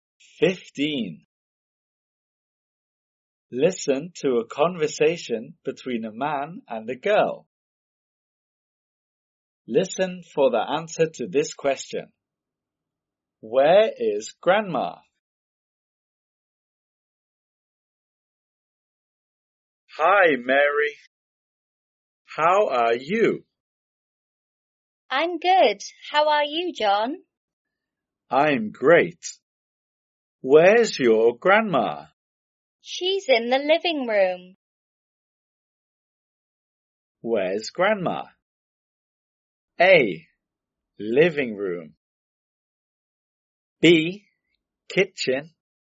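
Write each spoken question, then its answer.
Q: Where's Grandma?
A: A: Living room.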